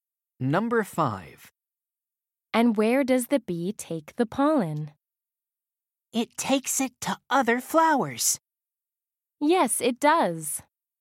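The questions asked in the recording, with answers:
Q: And where does the bee take the pollen?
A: to other flowers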